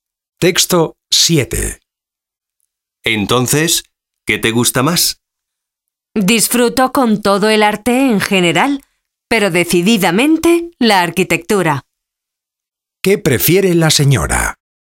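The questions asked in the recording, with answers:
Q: ¿Qué prefiere la señora?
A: La arquitectura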